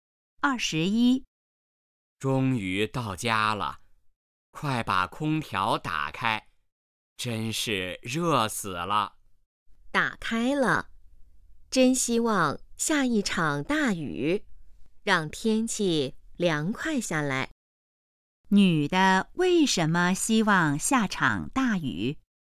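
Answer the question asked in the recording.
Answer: 天气太热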